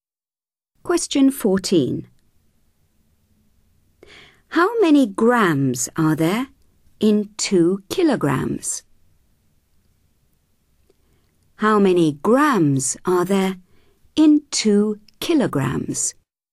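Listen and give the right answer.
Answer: 2000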